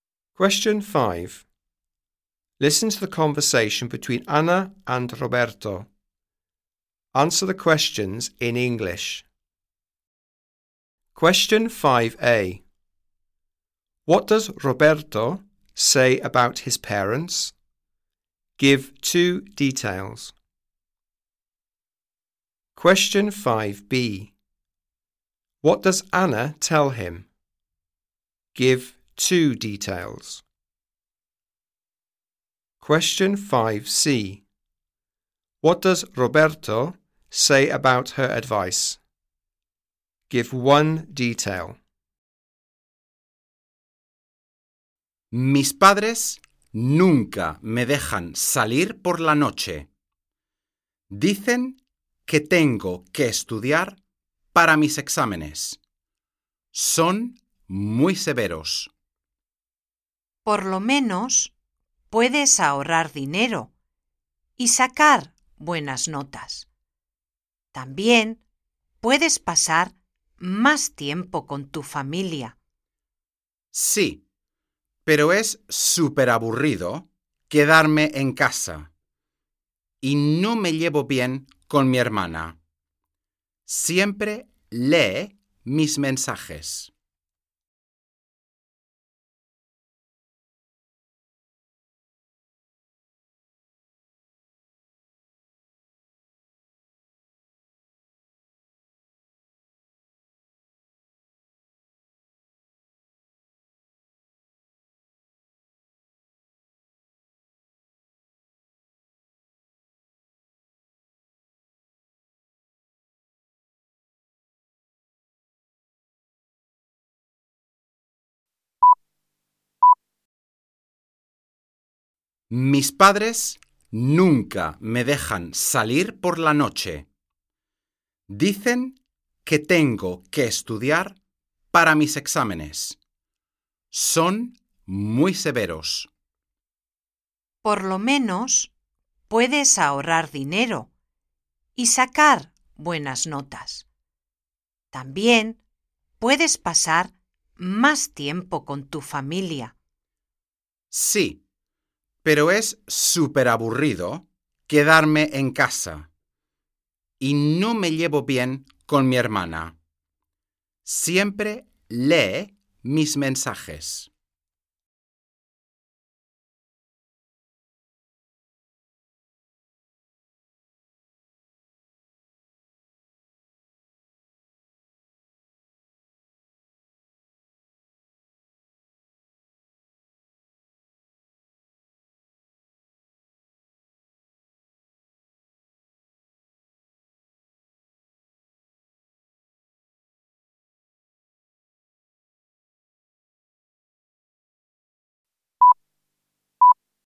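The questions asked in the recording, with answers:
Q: What does Roberto say about his parents?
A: They never let him go out at night; they say he must study for his exams; they are very strict

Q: What does Anna tell him?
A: He can save money and get good marks; he can spend more time with his family

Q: What does Roberto say about her advice?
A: Staying at home is super boring; he doesn't get on with his sister, who reads his messages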